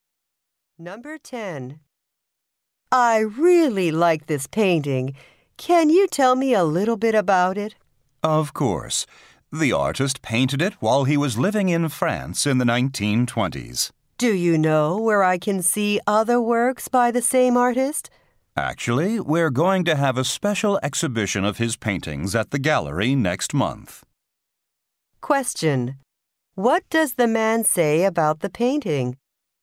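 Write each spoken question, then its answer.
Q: What does the man say about the painting?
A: The artist painted it while living in France in the 1920s.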